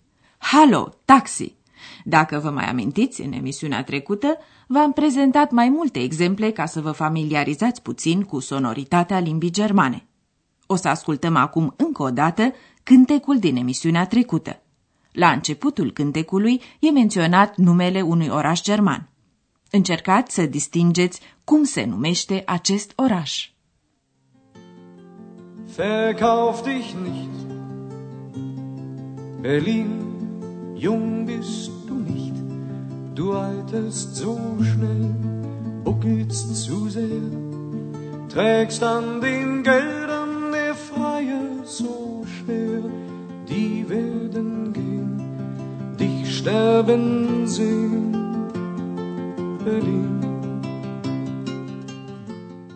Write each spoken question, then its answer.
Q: Încercați să distingeți cum se numește acest oraș.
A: Berlin. Berlin.